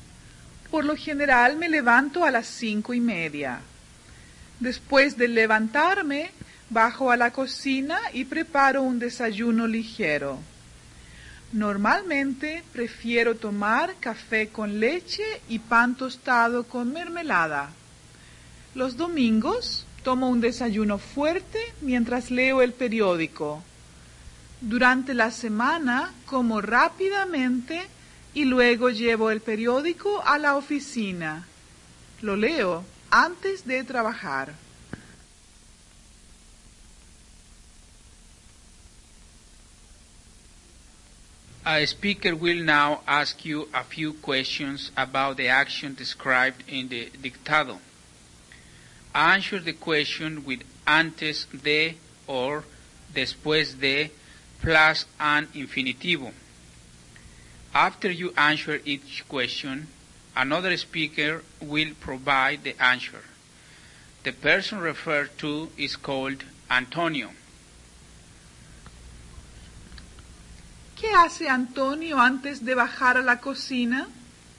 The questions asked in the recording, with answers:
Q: ¿Qué hace Antonio antes de bajar a la cocina?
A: Antes de bajar a la cocina, se levanta.